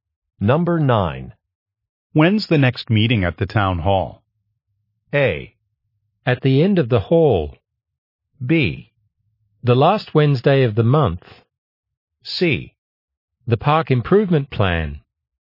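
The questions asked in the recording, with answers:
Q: When's the next meeting at the town hall?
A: B: The last Wednesday of the month.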